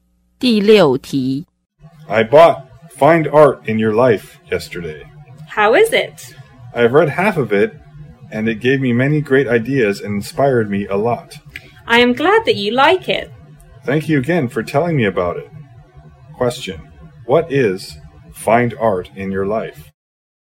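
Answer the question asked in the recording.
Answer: A book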